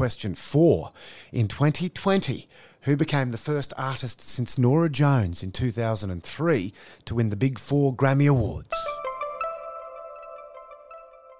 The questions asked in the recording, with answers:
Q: In 2020, who became the first artist since Norah Jones in 2003 to win the Big Four Grammy Awards?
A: It was Billie Eilish, who won Album of the Year, Record of the Year, Song of the Year, and Best New Artist.